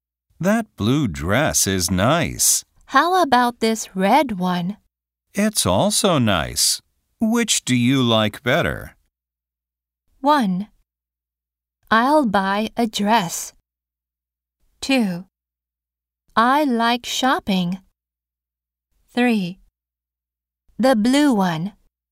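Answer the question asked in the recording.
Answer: 3: The blue one.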